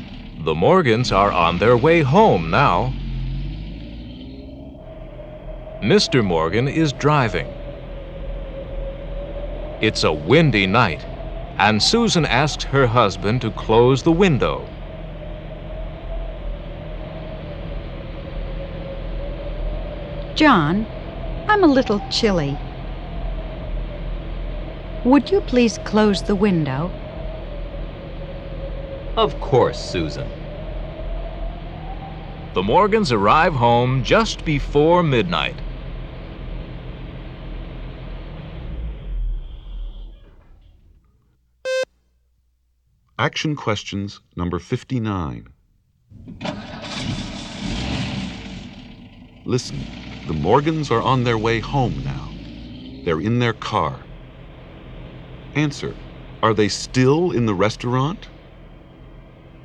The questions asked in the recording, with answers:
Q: Answer, are they still in the restaurant?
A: No, they're not.